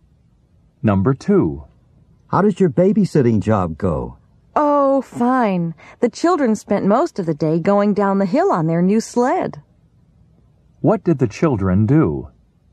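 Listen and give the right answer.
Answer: Went sledding down the hill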